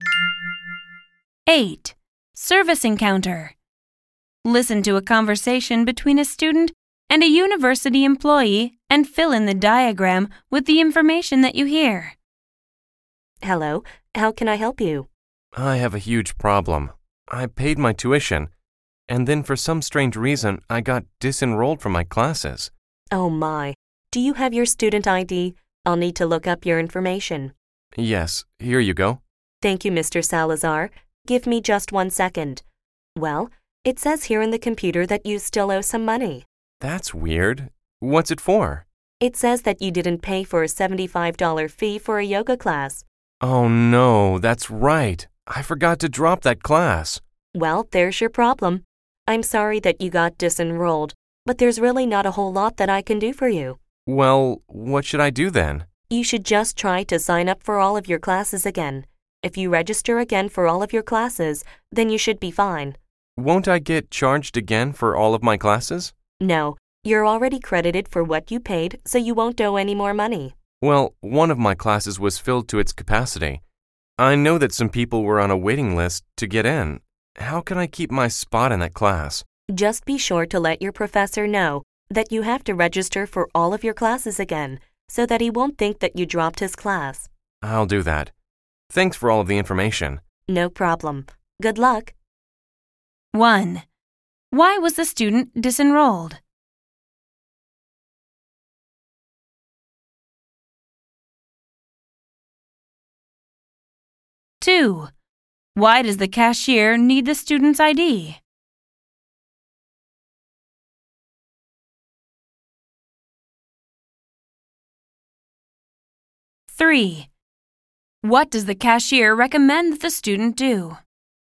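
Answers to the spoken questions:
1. He didn't pay a $75 fee for a yoga class he forgot to drop.
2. To look up his information.
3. Register again for all of his classes.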